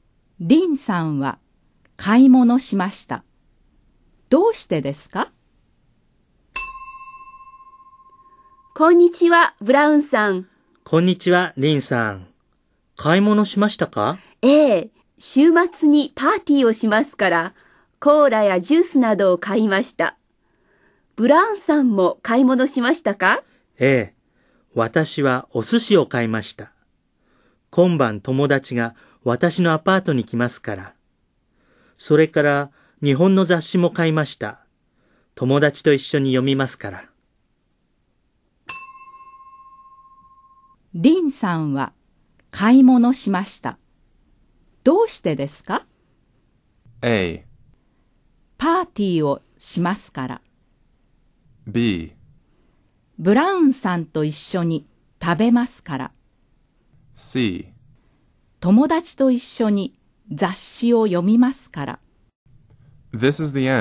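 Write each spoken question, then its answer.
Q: リンさんは買い物しました。どうしてですか?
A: A: パーティーをしますから。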